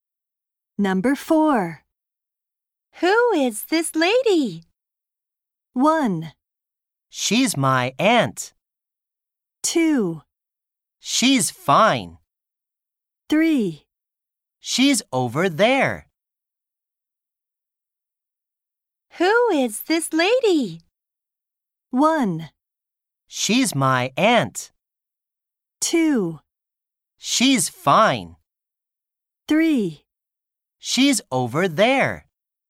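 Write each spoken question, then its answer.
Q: Who is this lady?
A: 1: She's my aunt.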